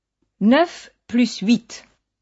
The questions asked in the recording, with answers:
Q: 9 plus 8.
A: Ça fait 17.